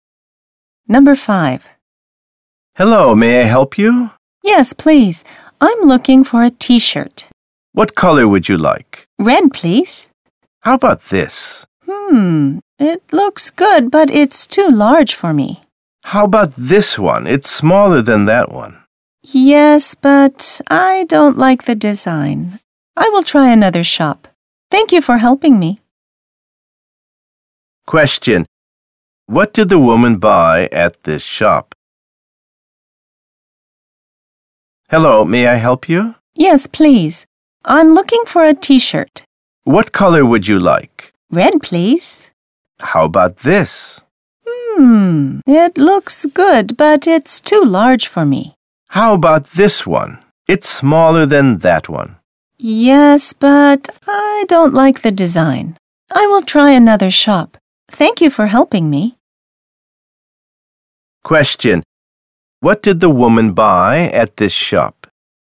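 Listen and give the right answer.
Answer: Nothing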